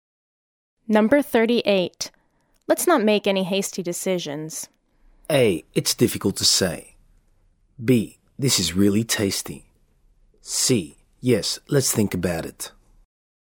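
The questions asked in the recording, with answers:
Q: Let's not make any hasty decisions.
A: C: Yes, let's think about it.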